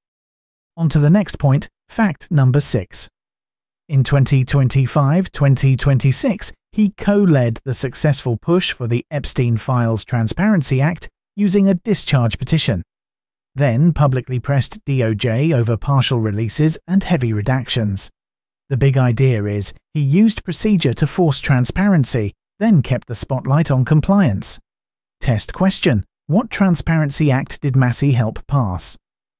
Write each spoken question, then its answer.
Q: what Transparency Act did Massie help pass?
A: the Epstein Files Transparency Act.